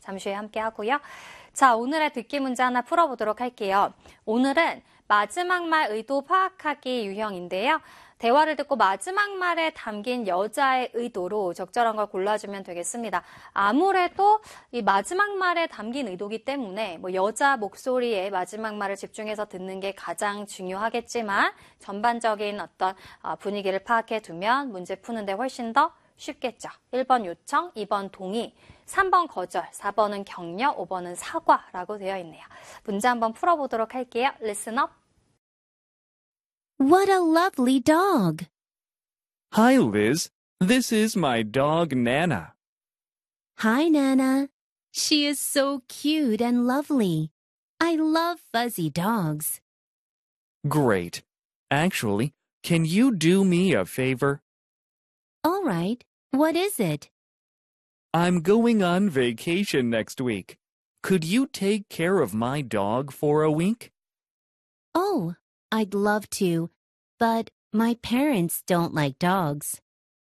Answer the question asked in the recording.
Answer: 여자의 마지막 말에 담긴 의도는 거절이었다는 거.